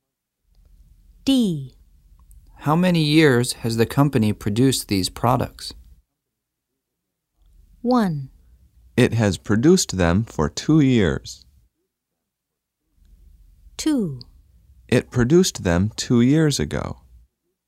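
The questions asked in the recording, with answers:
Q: How many years has the company produced these products?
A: 1: It has produced them for 2 years.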